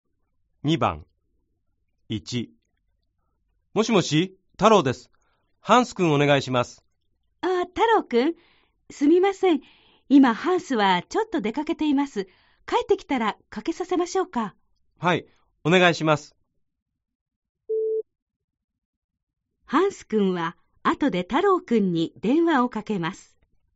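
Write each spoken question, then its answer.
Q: ハンス君は後で太郎君に電話をかけます。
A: ○(正しい)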